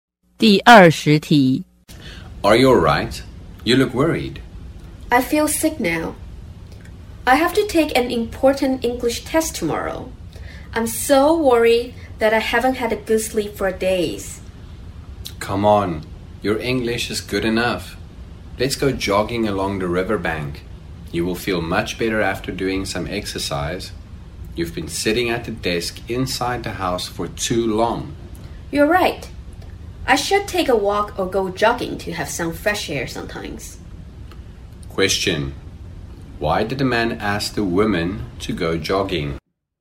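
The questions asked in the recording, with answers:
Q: Why did the man ask the woman to go jogging?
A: To help her feel better and get some fresh air after worrying about her test.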